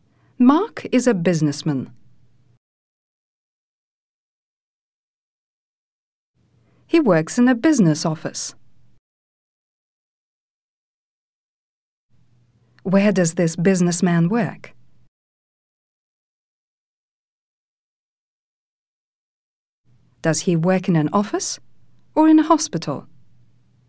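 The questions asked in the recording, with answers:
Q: Where does this businessman work?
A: In a business office

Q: Does he work in an office or in a hospital?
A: In an office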